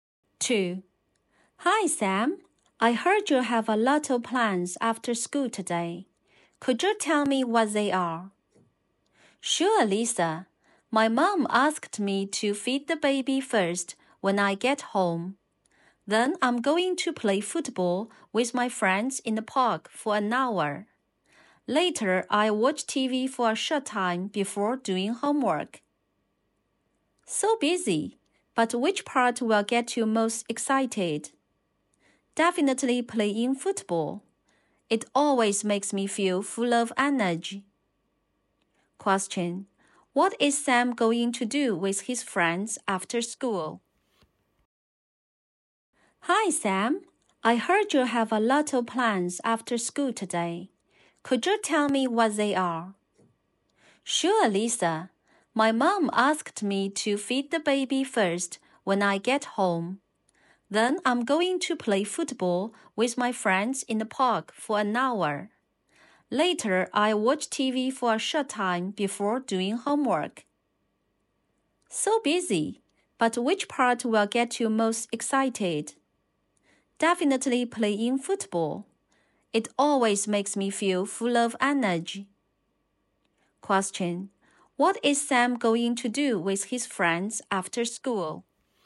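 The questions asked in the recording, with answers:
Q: What is Sam going to do with his friends after school?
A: Play football in the park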